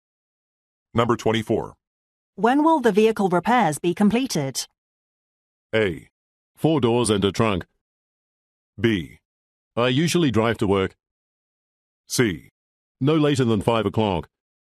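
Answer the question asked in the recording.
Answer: C: No later than 5 o'clock.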